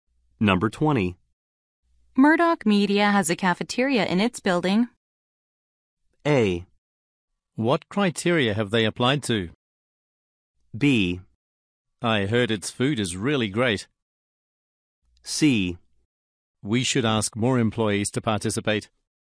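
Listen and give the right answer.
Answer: B: I heard its food is really great.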